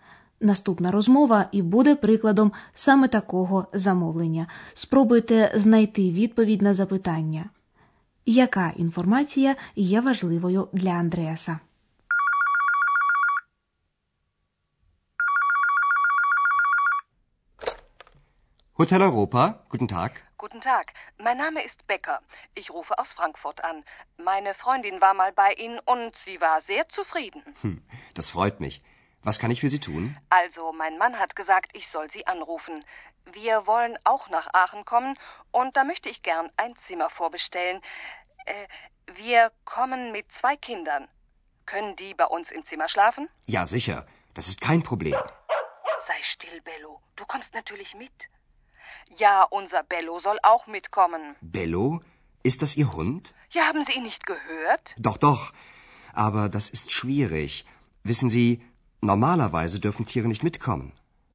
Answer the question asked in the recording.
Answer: Важливою інформацією для Андреаса є те, що жінка хоче заздалегідь замовити кімнату і що, крім сім'ї, вона привезе з собою ще й собаку.